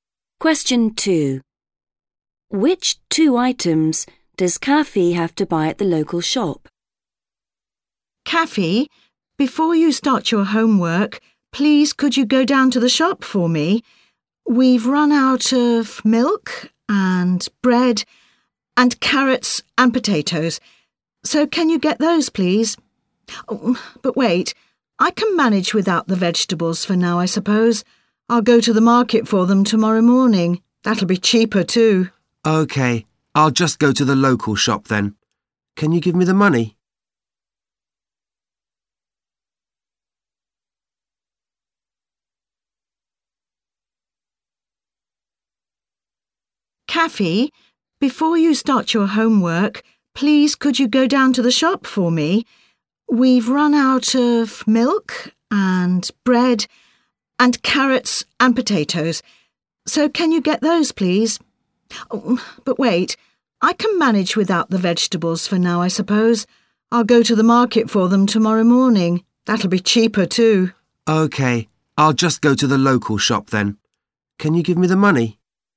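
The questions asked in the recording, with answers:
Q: Which two items does Kaffee have to buy at the local shop?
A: Milk and bread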